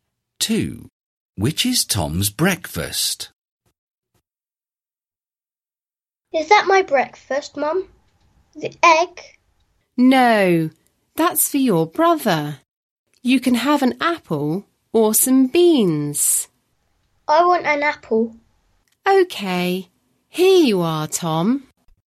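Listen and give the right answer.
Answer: an apple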